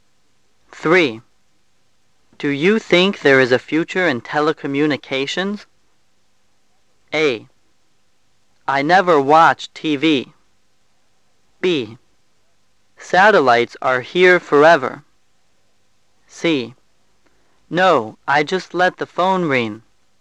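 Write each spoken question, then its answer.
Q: Do you think there is a future in telecommunications?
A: B: Satellites are here forever.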